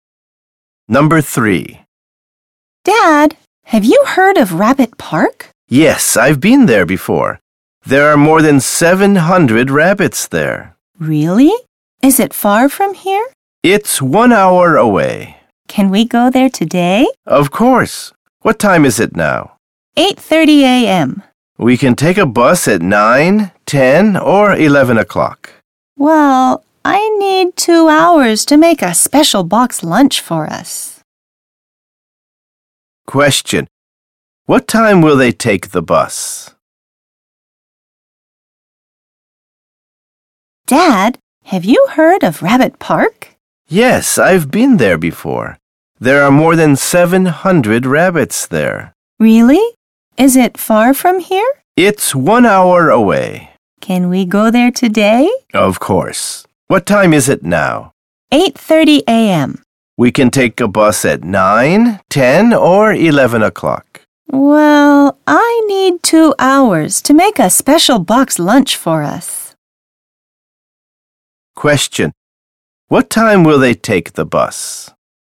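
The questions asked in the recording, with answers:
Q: What time will they take the bus?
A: At 11 o'clock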